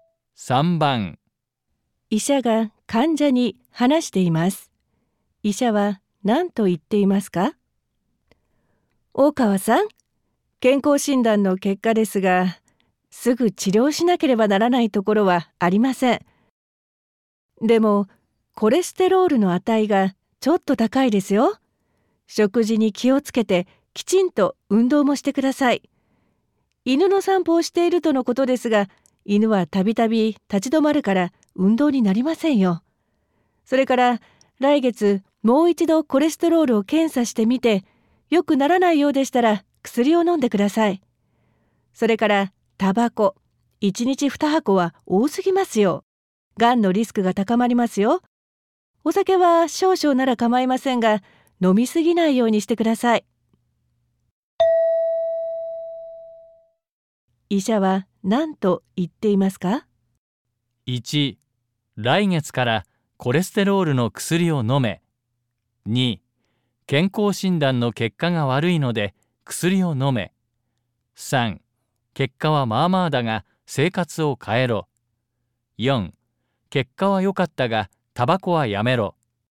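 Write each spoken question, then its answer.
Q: 医者は何と言っていますか?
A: 3: 結果はまあまあだが生活を変えろ。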